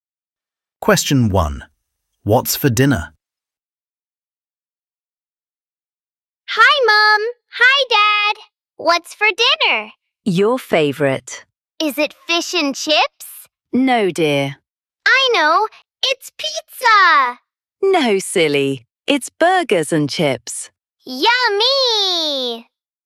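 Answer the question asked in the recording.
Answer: Burgers and chips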